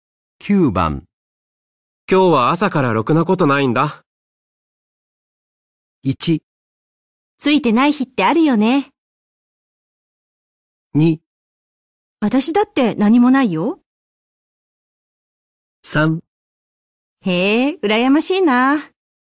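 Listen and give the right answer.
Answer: 1: ついてない日ってあるよね。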